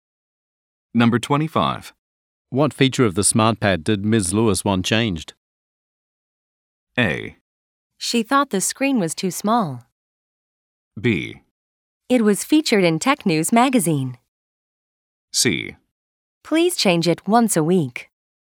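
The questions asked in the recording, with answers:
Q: What feature of the smart pad did Ms. Lewis want changed?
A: A: She thought the screen was too small.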